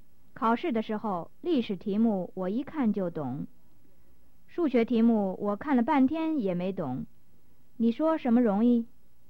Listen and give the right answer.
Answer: 我说历史题目容易。